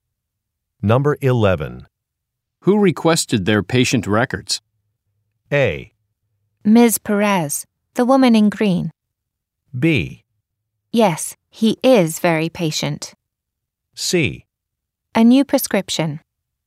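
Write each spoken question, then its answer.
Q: Who requested their patient records?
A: A: Ms. Perez, the woman in green.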